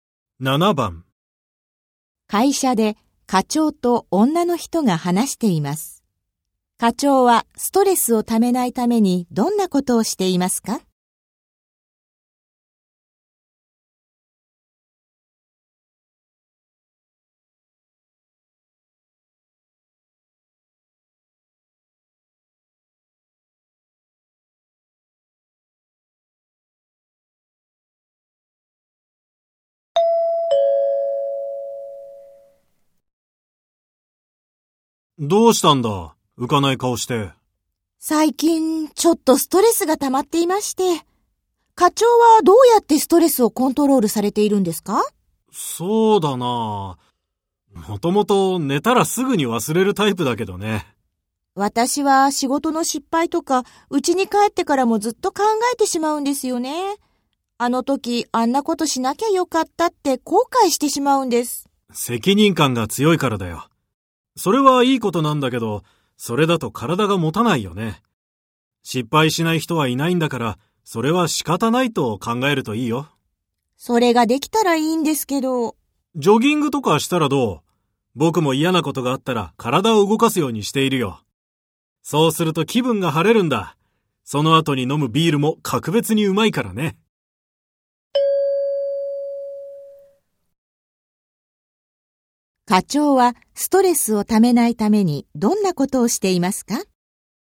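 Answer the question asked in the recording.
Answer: 嫌なことがあったら体を動かす(ジョギングなど)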